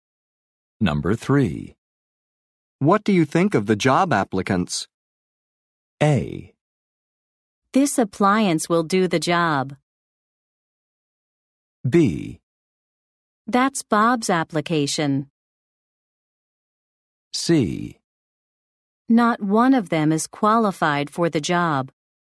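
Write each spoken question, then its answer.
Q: What do you think of the job applicants?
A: C: Not one of them is qualified for the job.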